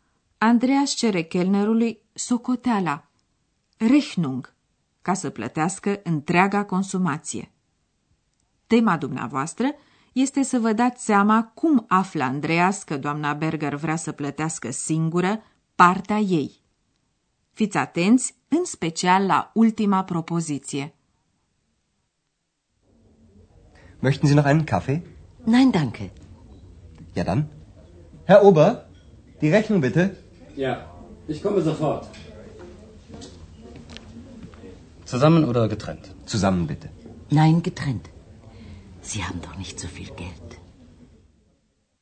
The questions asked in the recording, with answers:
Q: Tema dumneavoastră este să vă dați seama cum află Andreas că doamna Berger vrea să plătească singură partea ei.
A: Doamna Berger vrea să plătească singură ceea ce a consumat ea